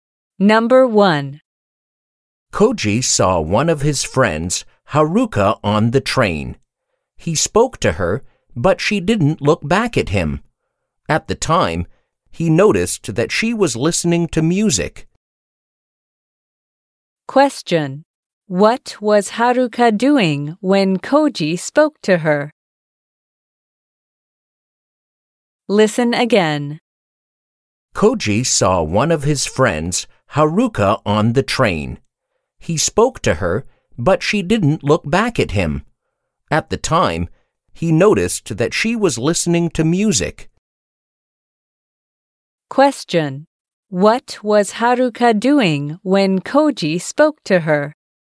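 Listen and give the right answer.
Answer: Listening to music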